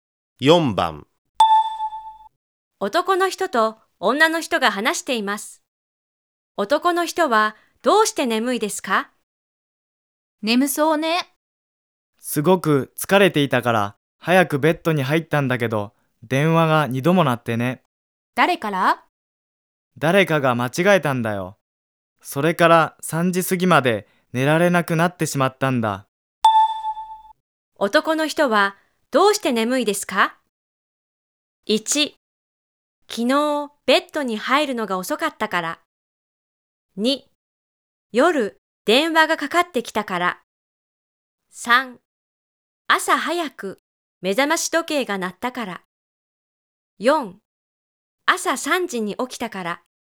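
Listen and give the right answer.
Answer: 2: 夜電話がかかってきたから。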